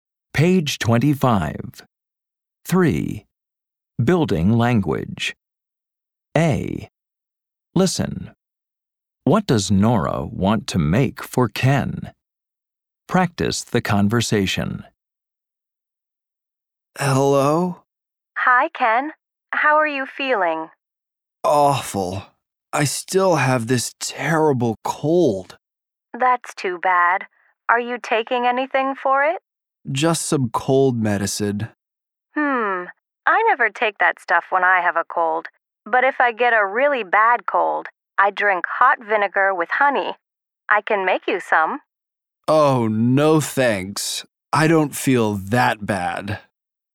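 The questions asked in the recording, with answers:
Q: What does Nora want to make for Ken?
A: Hot vinegar with honey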